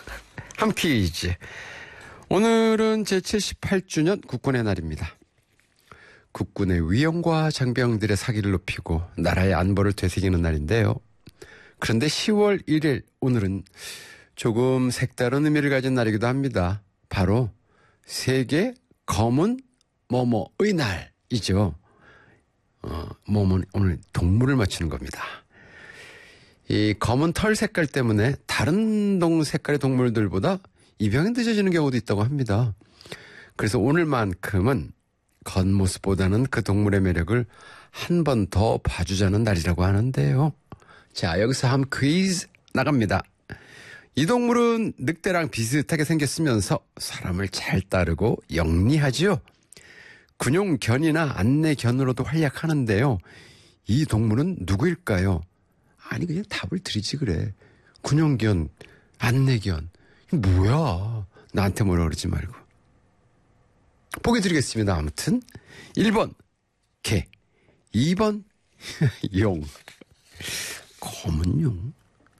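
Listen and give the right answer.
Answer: 1번: 개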